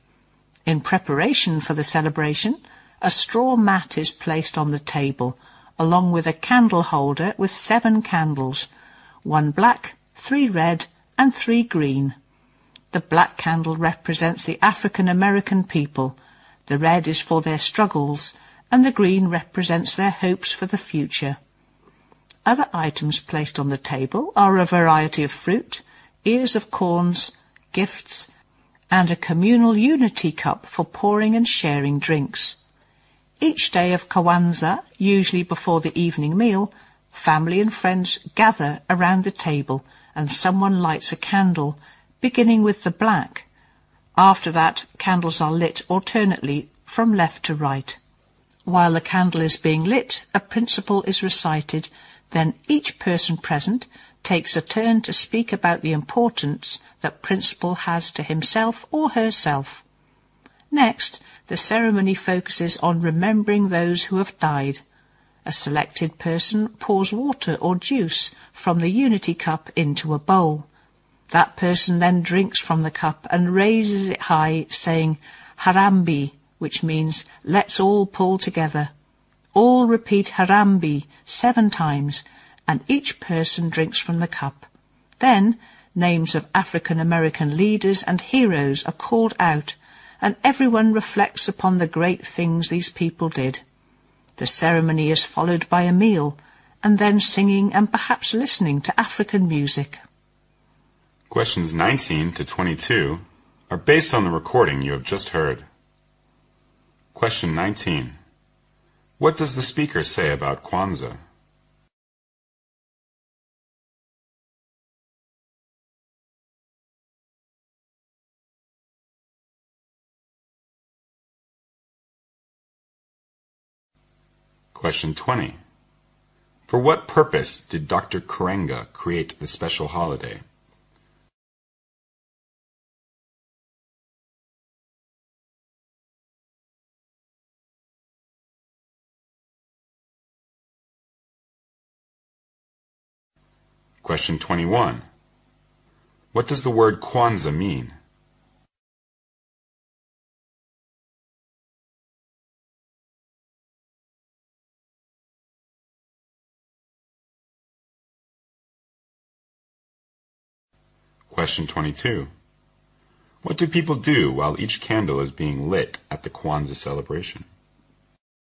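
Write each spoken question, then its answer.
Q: What do people do while each candle is being lit at the Kwanzaa celebration?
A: They recite a principle.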